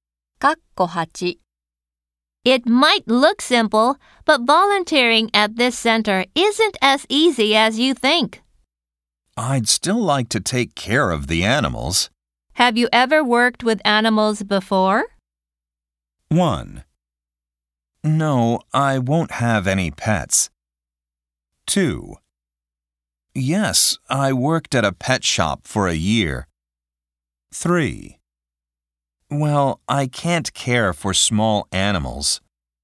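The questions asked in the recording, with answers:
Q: Have you ever worked with animals before?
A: 2: Yes, I worked at a pet shop for a year.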